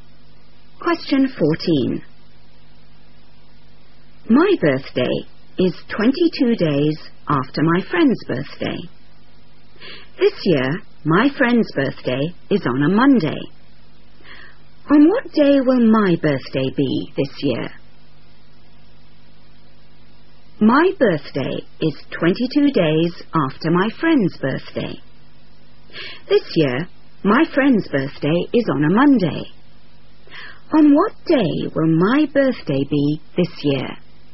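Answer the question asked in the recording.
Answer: Tuesday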